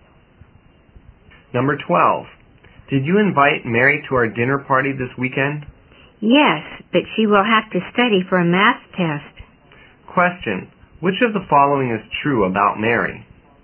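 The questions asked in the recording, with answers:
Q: which of the following is true about Mary?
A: She has to study for a math test, so she may not come to the party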